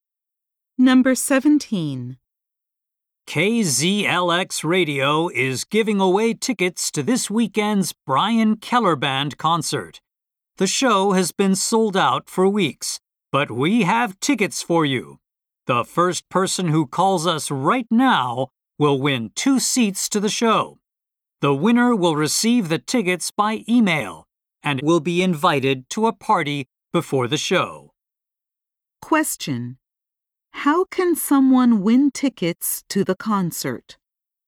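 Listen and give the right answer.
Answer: By being the first person to call the radio station right now.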